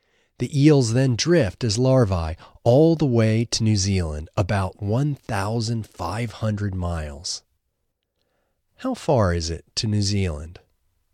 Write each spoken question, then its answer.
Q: How far is it to New Zealand?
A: It's about 1,500 miles to New Zealand.